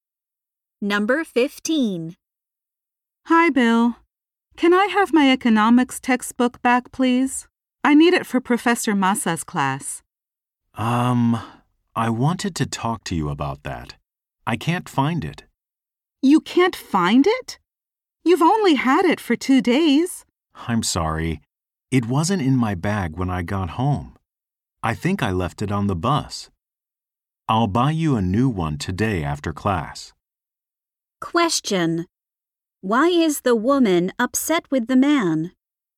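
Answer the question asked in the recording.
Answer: He lost her economics textbook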